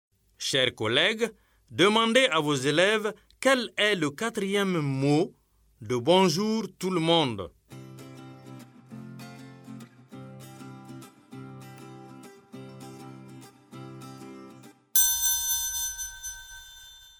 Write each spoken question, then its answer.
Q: Chers collègues, demandez à vos élèves quel est le quatrième mot de bonjour tout le monde.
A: J'espère que vos élèves ont dit monde.